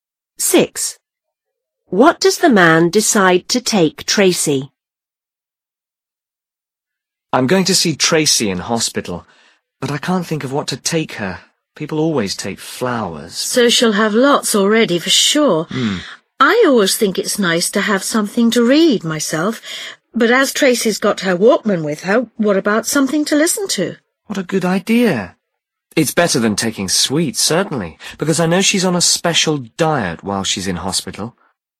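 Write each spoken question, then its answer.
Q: What does the man decide to take Tracy?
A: Something to listen to (for her Walkman)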